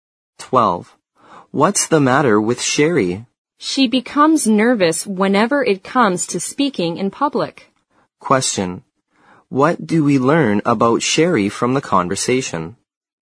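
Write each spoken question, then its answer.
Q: What do we learn about Sherry from the conversation?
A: She gets nervous when speaking in public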